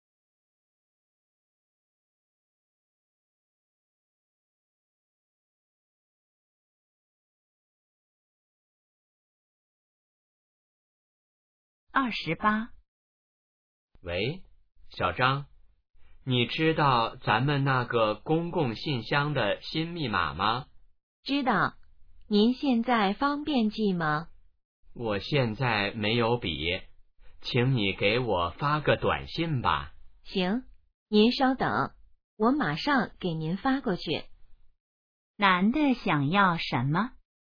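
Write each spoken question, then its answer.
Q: 男的想要什么?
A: 公共信箱的新密码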